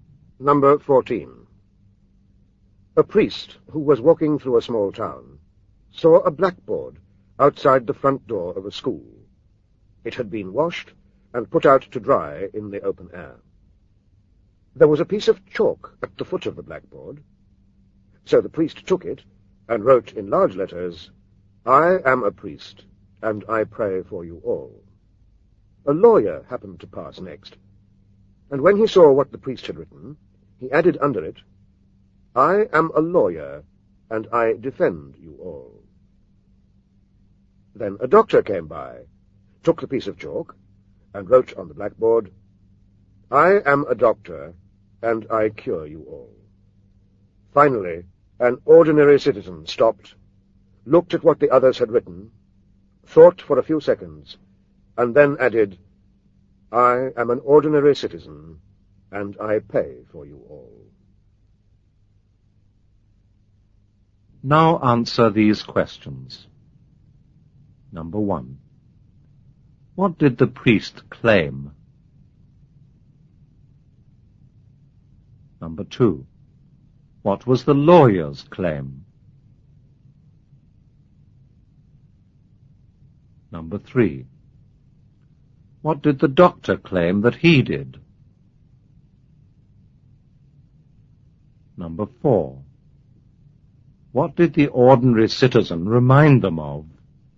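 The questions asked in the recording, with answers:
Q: What did the priest claim?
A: He prayed for them all

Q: What was the lawyer's claim?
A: He defended them all

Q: What did the doctor claim that he did?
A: He cured them all

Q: What did the ordinary citizen remind them of?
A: That he paid for them all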